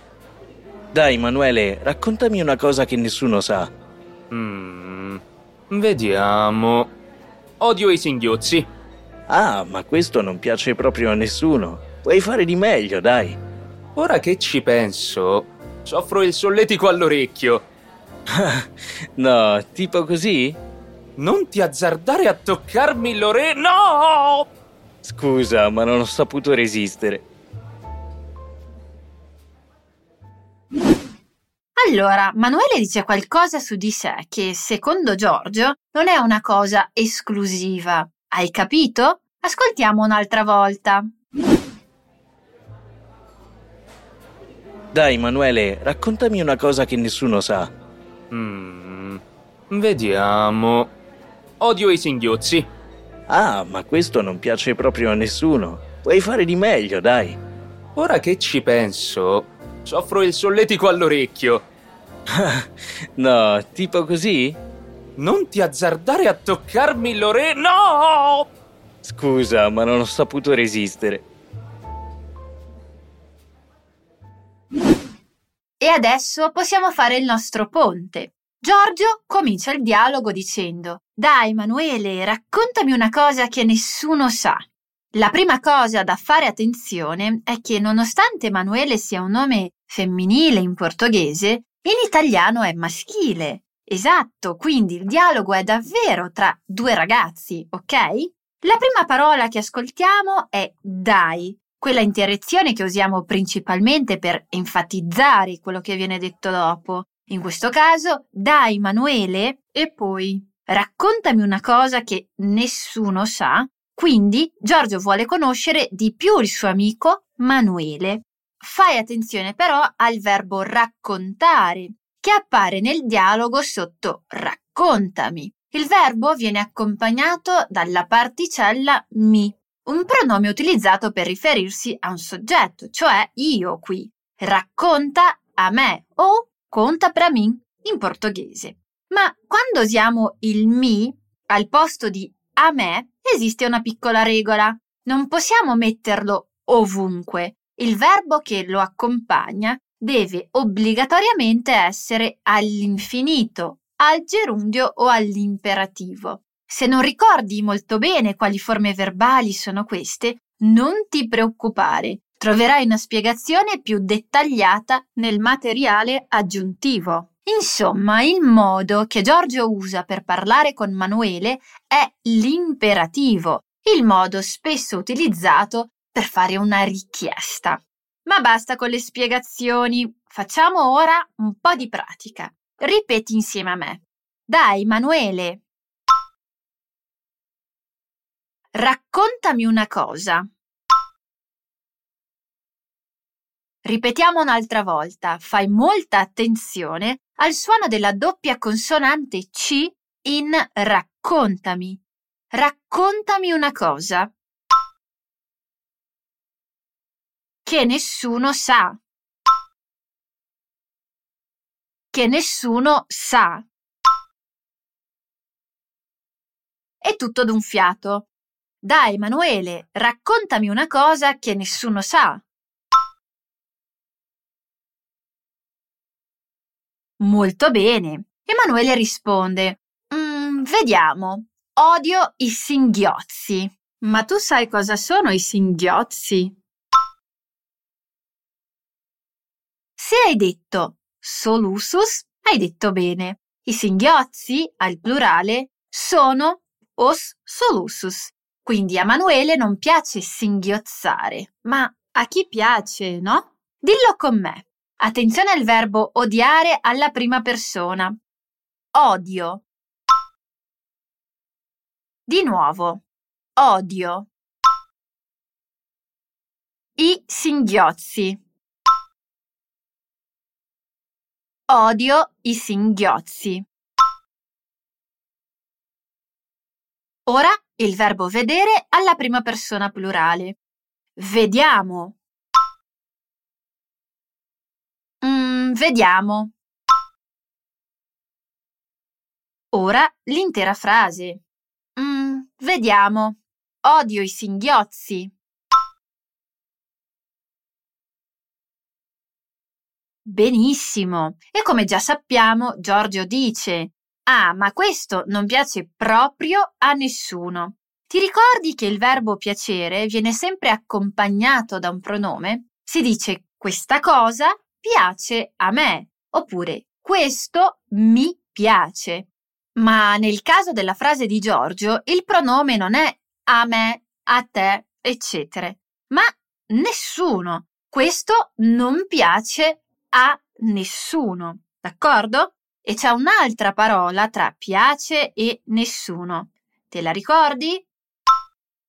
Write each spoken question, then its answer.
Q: E c'è un'altra parola tra piace e nessuno. Te la ricordi?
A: è proprio